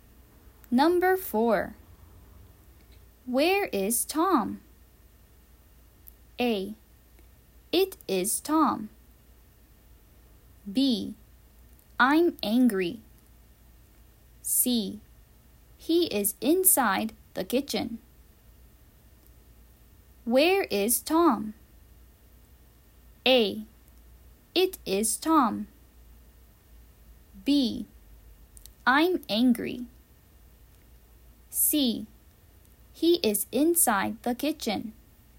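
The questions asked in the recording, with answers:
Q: Where is Tom?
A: C: He is inside the kitchen.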